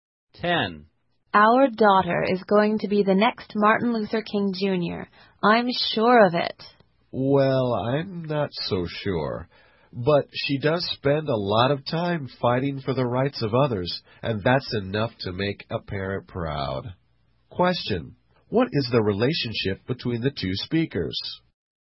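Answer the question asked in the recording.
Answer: Husband and wife (parents)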